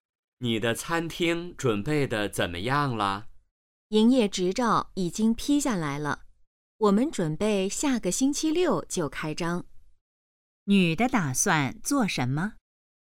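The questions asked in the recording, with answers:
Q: 女的打算做什么?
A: 下个星期六开餐厅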